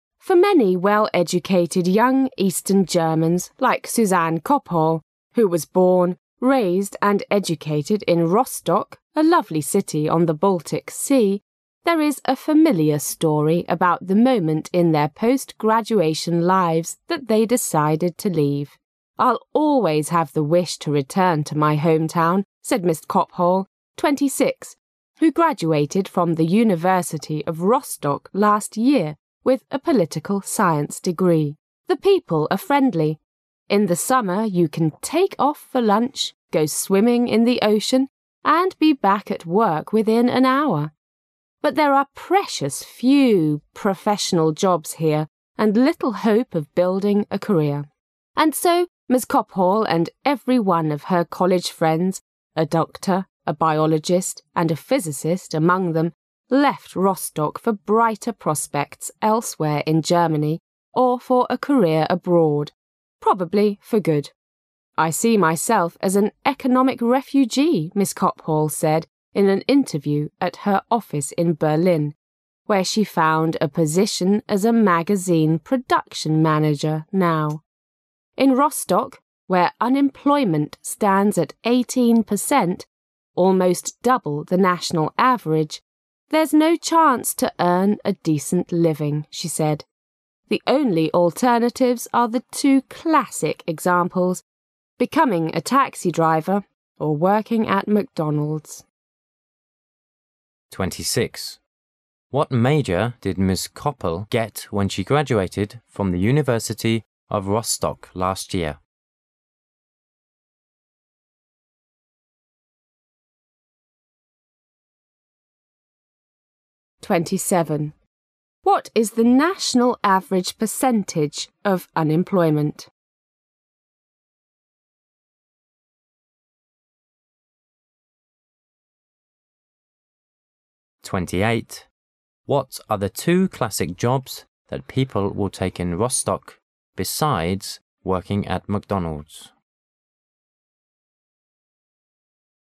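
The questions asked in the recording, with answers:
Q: What major did Ms. Koppel get when she graduated from the University of Rostock last year?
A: Political science

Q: What are the two classic jobs that people will take in Rostock besides working at McDonald's?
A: Becoming a taxi driver

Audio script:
[解析] 26-28 For many well-educated young eastern Germans like Susanne Kophal, who was born, raised and educated in Rostock, a lovely city on the Baltic Sea, there is a familiar story about the moment in their post-graduation lives that they decided to leave. "I'll always have the wish to return to my hometown," said Ms. Kophal, 26, who graduated from the University of Rostock last year with a political science degree. "The people are friendly. In the summer you can take off for lunch, go swimming in the ocean and be back at work within an hour. But there are precious few professional jobs here and little hope of building a career. 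'And so, Ms. Kophal and every one of her college friends: a doctor, a biologist and a physicist among them, left Rostock for brighter prospects elsewhere in Germany or for a career abroad, probably for good. "I see myself as an economic refugee," Ms. Kophal said in an interview at her office in Berlin, where she found a position as a magazine production manager now. In Rostock, where unemployment stands at 18 percent, almost double the national average, "there's no chance to earn a decent living," she said. "The only alternatives are the two classic examples, becoming a taxi driver or working at McDonald's." 26. What major did Ms.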